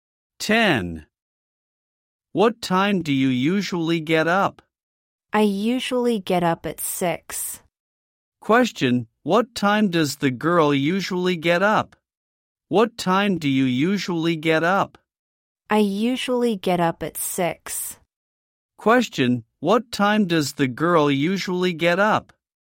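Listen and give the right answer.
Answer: At 6.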